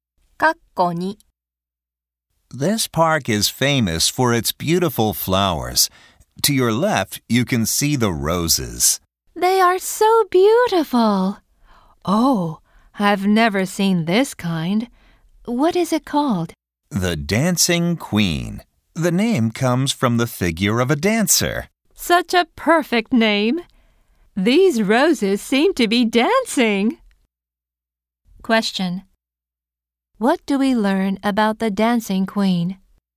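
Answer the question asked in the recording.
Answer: It is a rose named after the figure of a dancer.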